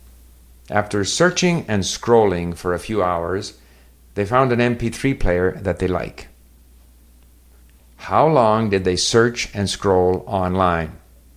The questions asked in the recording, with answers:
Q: How long did they search and scroll online?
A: A few hours.